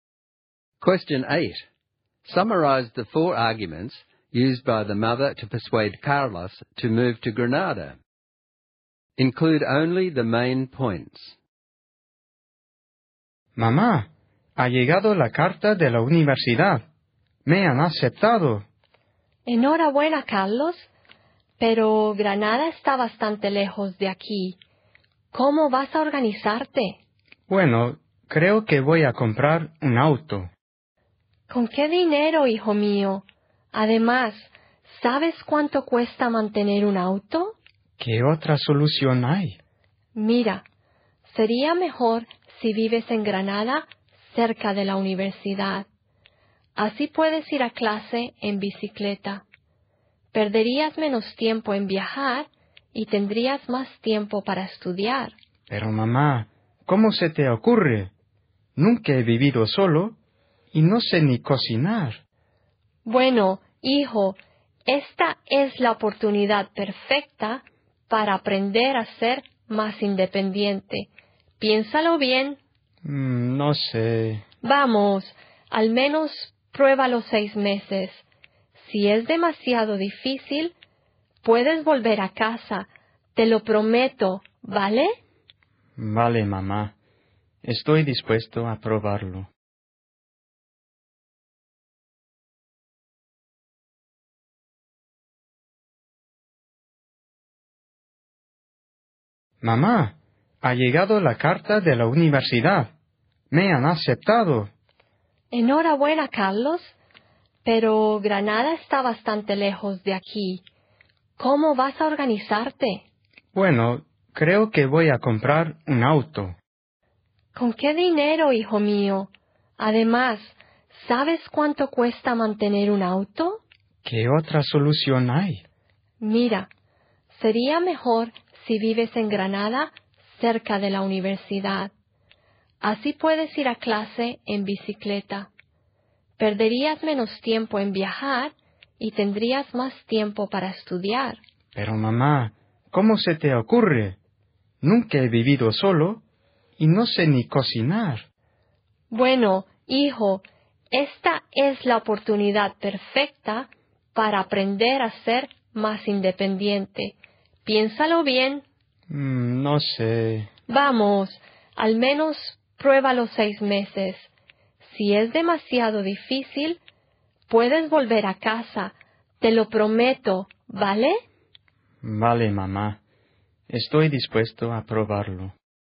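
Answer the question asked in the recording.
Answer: A car is too expensive to buy and keep; living near the university he can cycle to class and have more time to study; it's a chance to become independent; he can try for 6 months and come home if it's too hard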